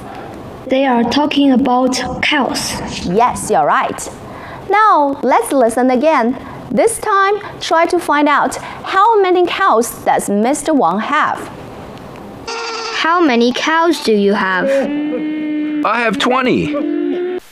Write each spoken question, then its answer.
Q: how many cows does Mr. Wang have?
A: Yes, he has 20 cows.